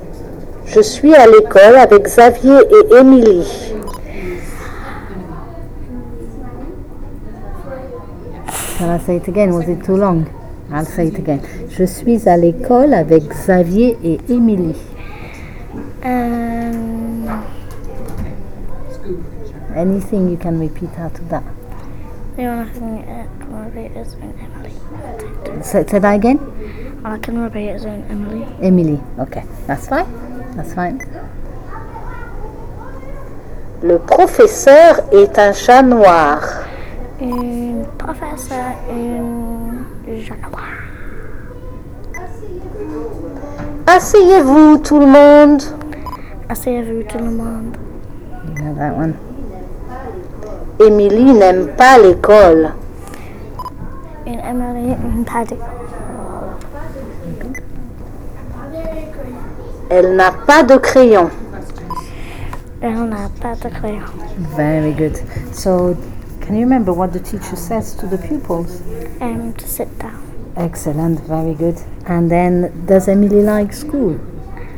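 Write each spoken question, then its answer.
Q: So, can you remember what the teacher says to the pupils?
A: Sit down, everyone

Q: And then, does Emily like school?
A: No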